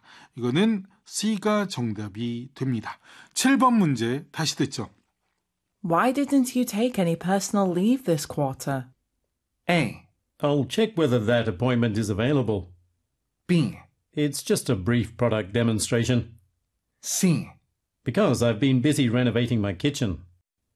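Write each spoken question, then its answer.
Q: Why didn't you take any personal leave this quarter?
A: C: Because I've been busy renovating my kitchen.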